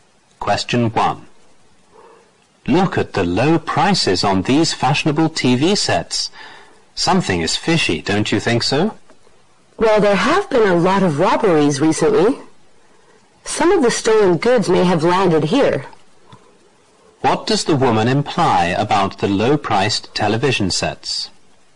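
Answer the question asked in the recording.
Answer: They may be stolen goods.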